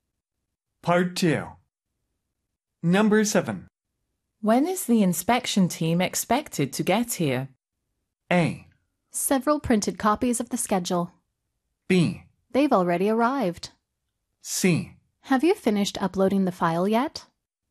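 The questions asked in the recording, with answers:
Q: When is the inspection team expected to get here?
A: B: They've already arrived.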